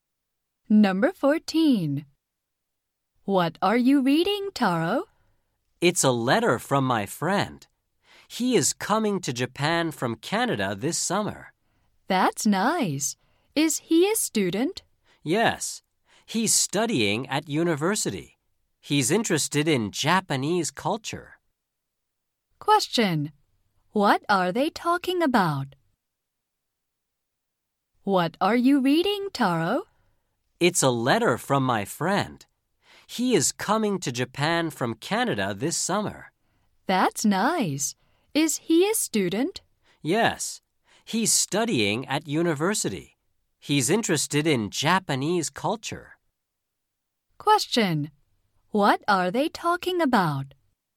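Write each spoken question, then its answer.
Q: What are they talking about?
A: Taro's friend from Canada.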